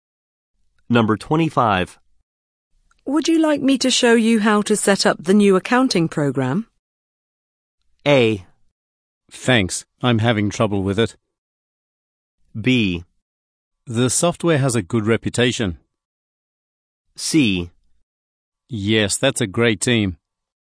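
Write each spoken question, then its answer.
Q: Would you like me to show you how to set up the new accounting program?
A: A: Thanks, I'm having trouble with it.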